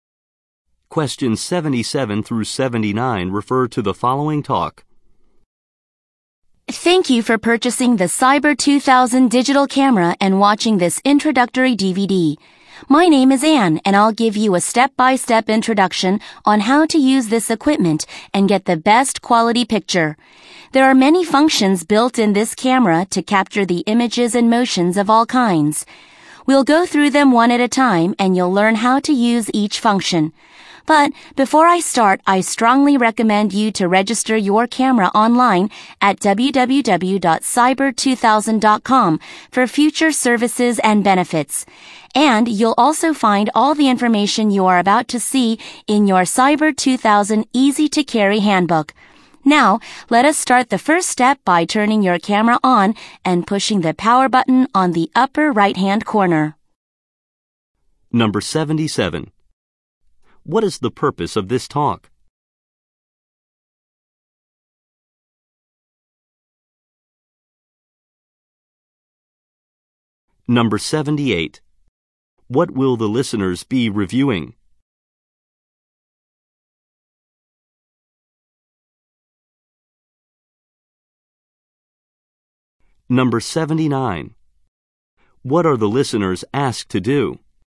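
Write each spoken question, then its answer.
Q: What is the purpose of this talk?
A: To explain how to use a digital camera

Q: What will the listeners be reviewing?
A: The camera's functions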